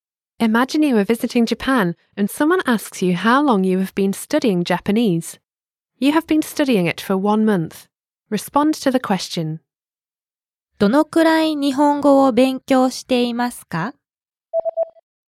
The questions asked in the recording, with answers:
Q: どのくらい日本語を勉強していますか?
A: 1ヶ月間です。